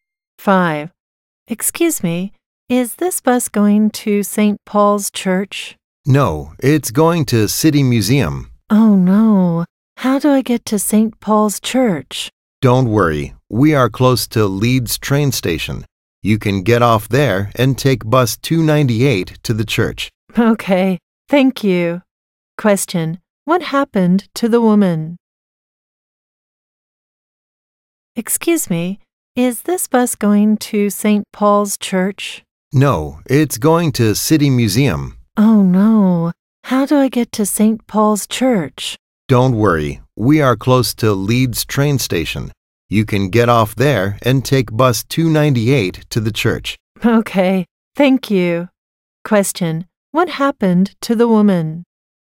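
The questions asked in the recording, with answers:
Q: Question, what happened to the woman?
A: She took the wrong bus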